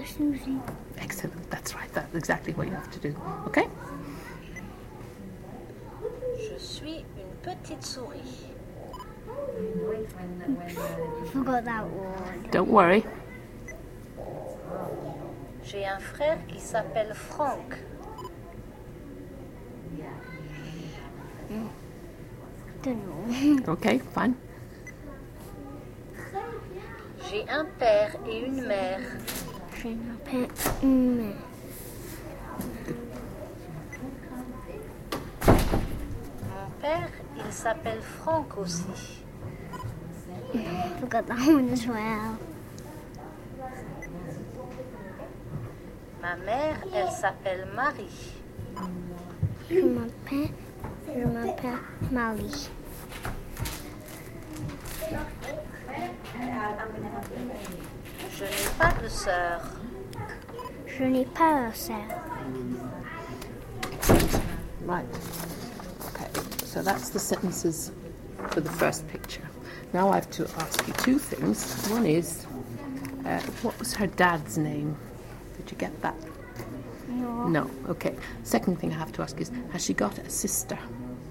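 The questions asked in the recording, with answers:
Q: One is, what was her dad's name?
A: Franck

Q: Second thing I have to ask is, has she got a sister?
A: No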